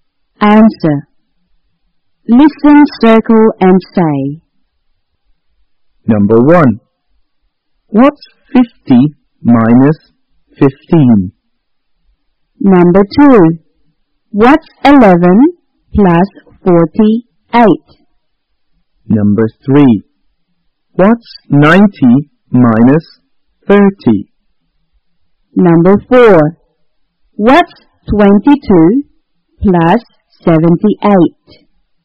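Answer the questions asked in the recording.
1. 35
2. 59
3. 60
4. 100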